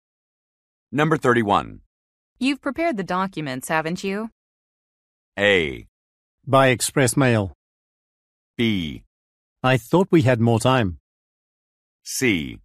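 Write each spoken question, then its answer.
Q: You've prepared the documents, haven't you?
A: B: I thought we had more time.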